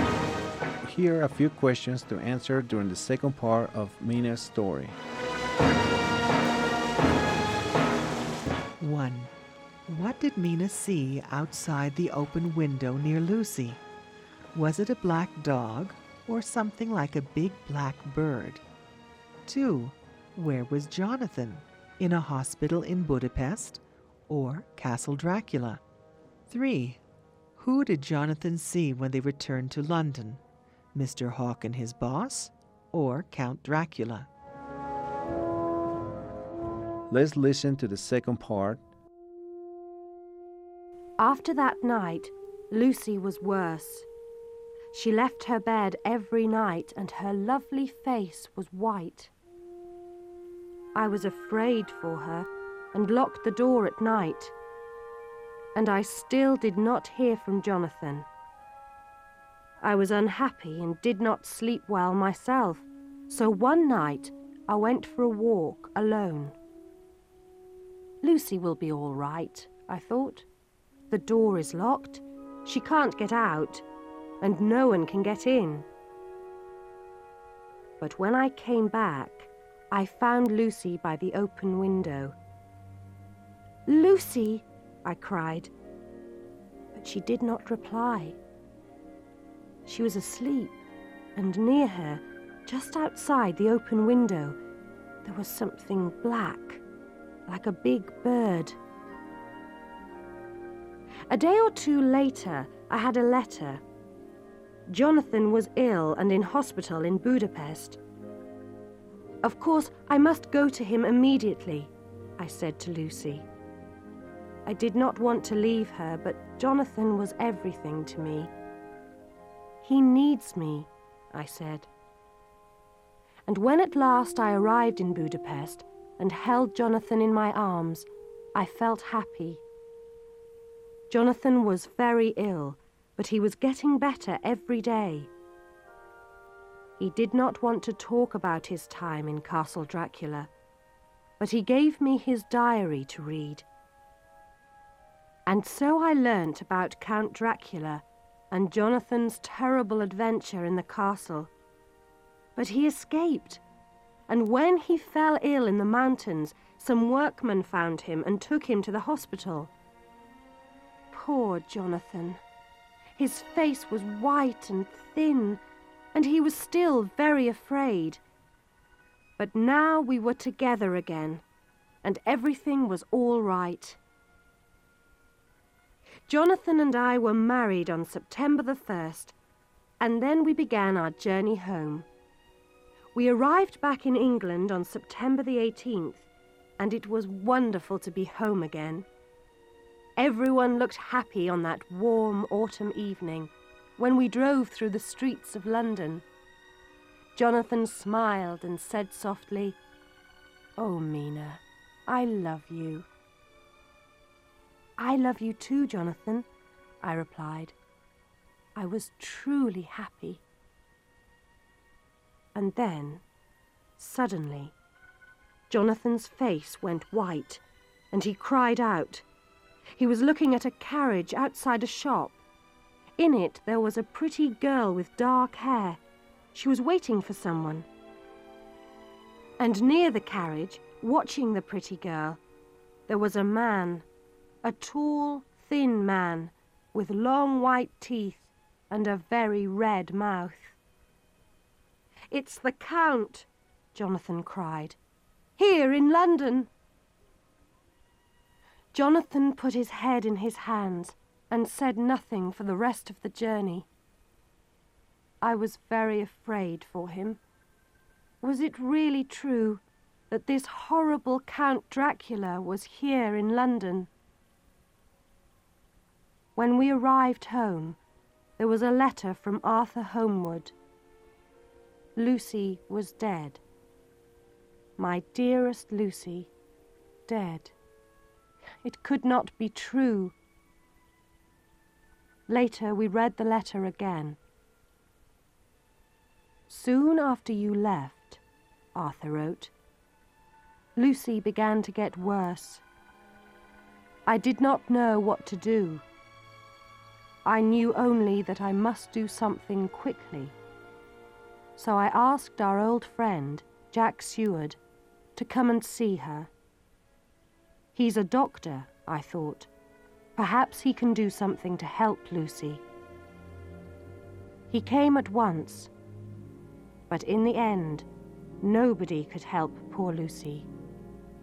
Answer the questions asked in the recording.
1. outside, near Lucy, there was something black like a big bird.
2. Jonathan was ill in a hospital in Budapest.
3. until Jonathan saw Count Dracula watching a pretty girl.